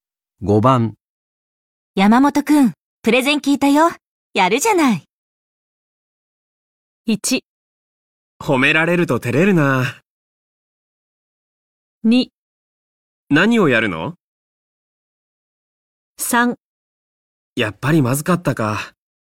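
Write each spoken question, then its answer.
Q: 山本くん、プレゼン聞いたよ。やるじゃない。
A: 1: 褒められると照れるな。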